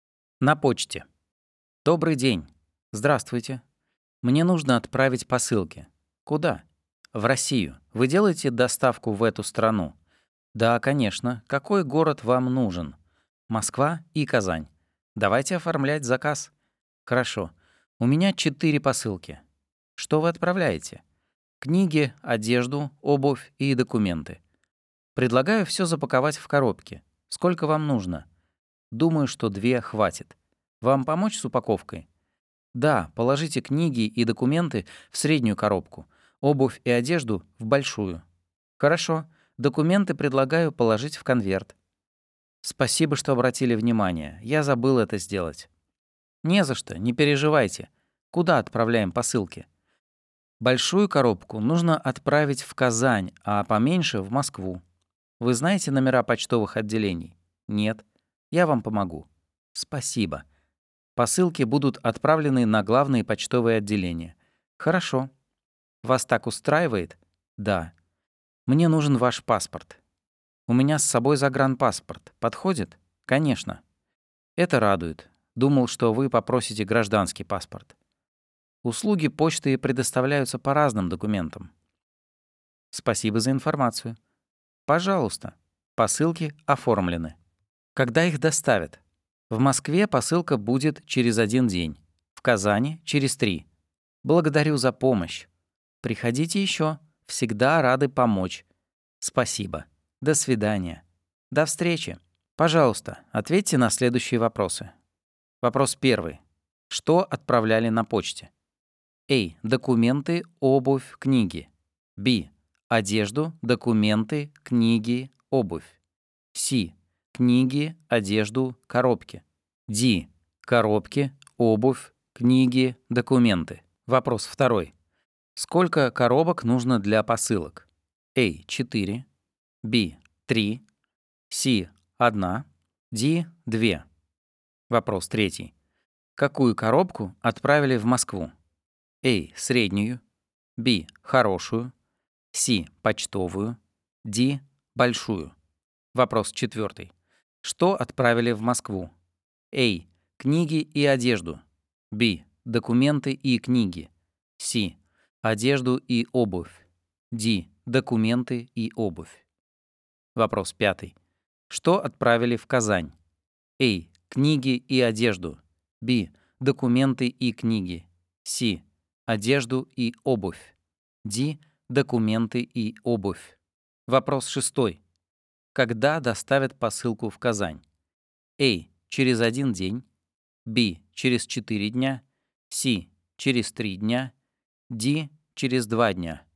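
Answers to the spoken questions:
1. B: Одежду, документы, книги, обувь.
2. Д: 2
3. А: Среднюю.
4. Б: Документы и книги.
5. С: Одежду и обувь.
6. С: Через 3 дня.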